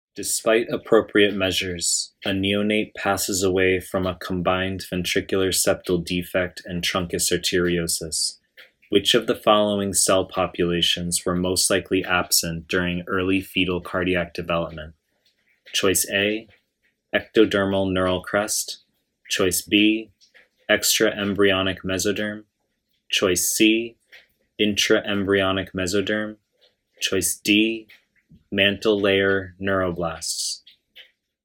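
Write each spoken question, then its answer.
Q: Which of the following cell populations were most likely absent during early fetal cardiac development?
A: A: ectodermal neural crest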